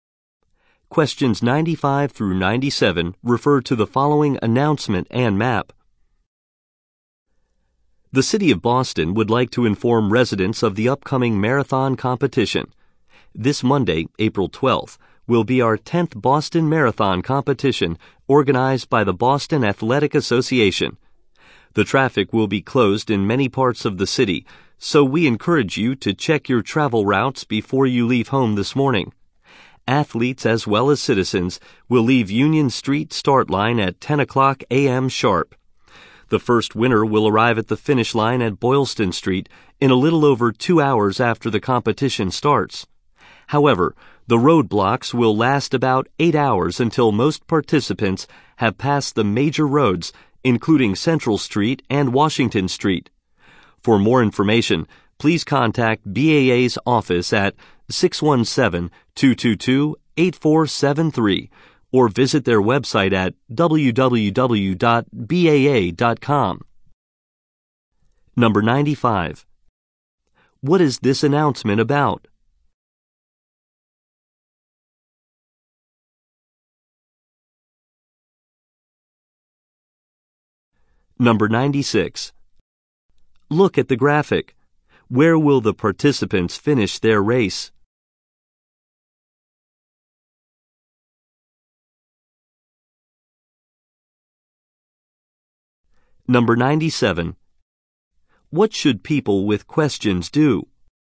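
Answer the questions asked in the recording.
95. The Boston Marathon and road closures
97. Contact the BAA office or visit its website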